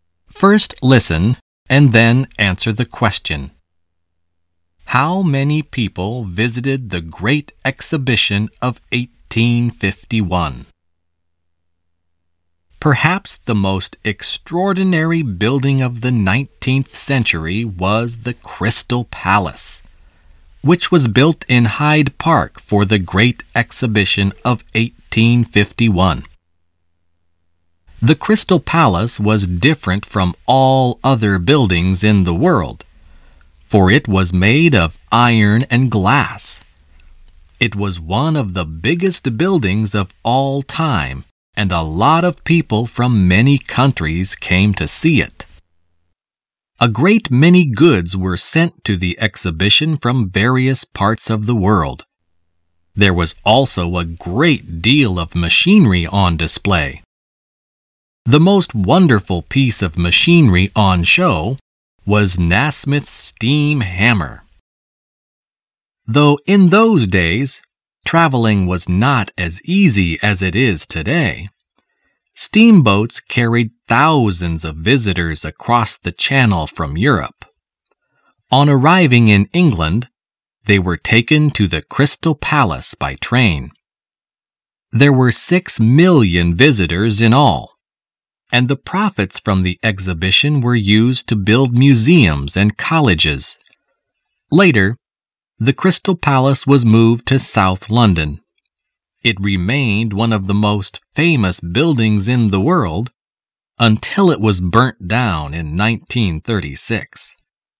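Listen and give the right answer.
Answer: 6 million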